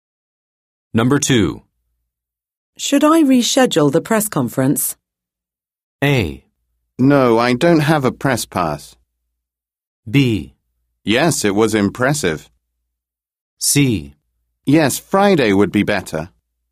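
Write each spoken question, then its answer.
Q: Should I reschedule the press conference?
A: C: Yes, Friday would be better.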